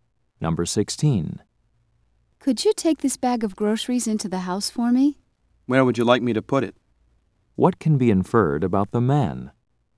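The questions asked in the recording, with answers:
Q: What can be inferred about the man?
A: He will carry the groceries in.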